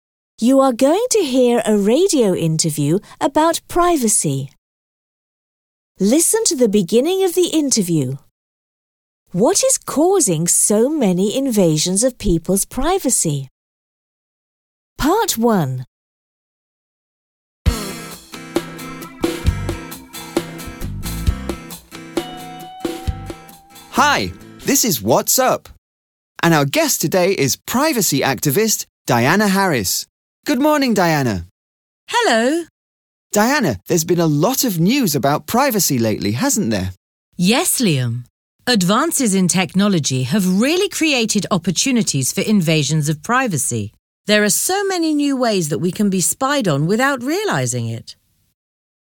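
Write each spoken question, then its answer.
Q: What is causing so many invasions of people's privacy?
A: Advances in technology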